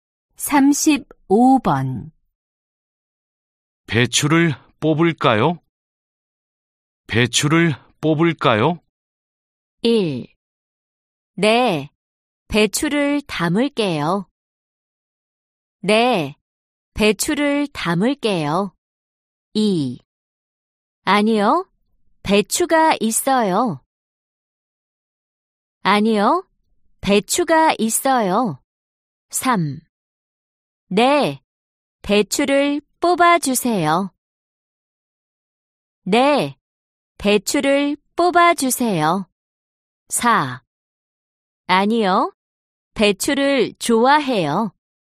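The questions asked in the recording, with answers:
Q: 배추를 뽑을까요?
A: 3: 네, 배추를 뽑아주세요.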